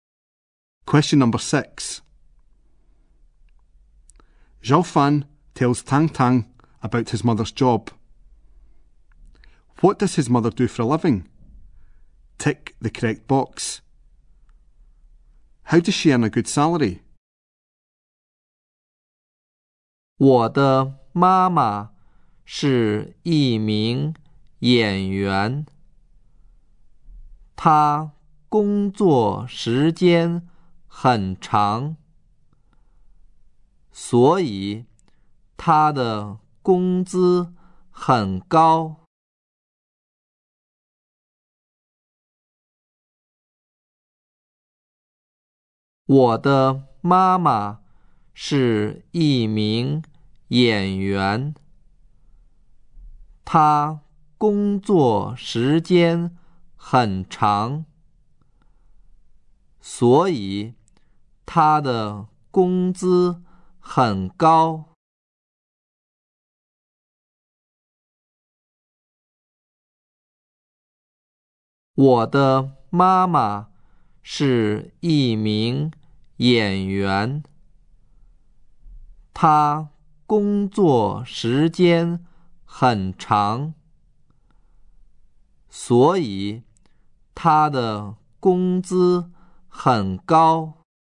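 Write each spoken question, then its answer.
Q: What does his mother do for a living?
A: She is an actress

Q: How does she earn a good salary?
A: She works long hours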